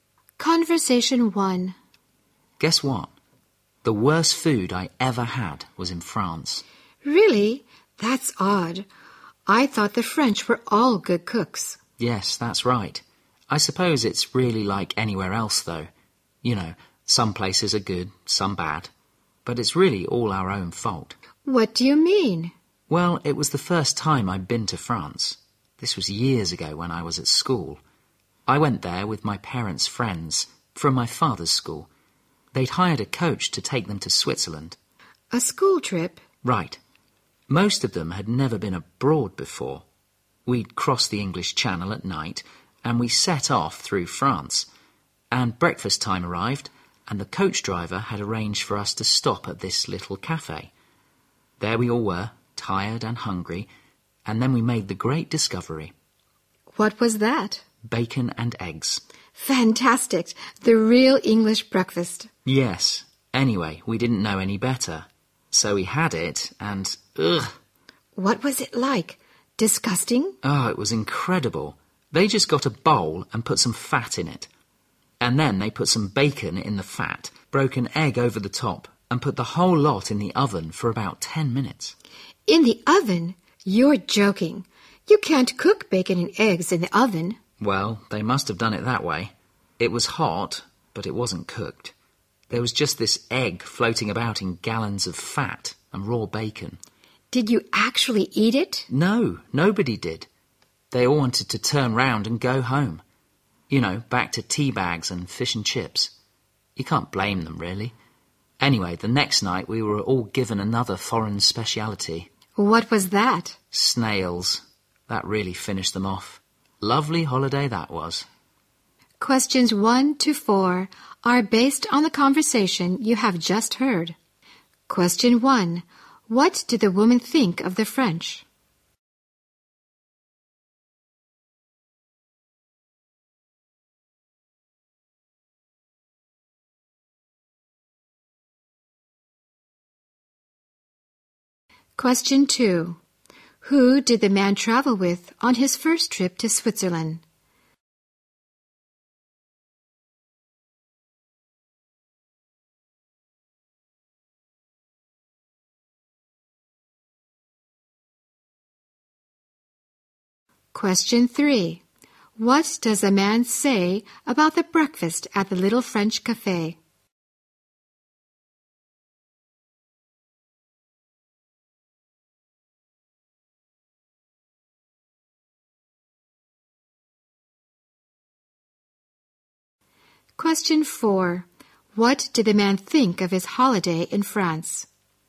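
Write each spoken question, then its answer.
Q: What did the woman think of the French?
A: They were all good cooks.

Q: Who did the man travel with on his first trip to Switzerland?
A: His parents' friends from his father's school (a school trip).

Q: What does a man say about the breakfast at the little French cafe?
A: It was disgusting: bacon and eggs in fat, hot but not cooked.

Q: What did the man think of his holiday in France?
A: It was a bad holiday (said ironically to be lovely).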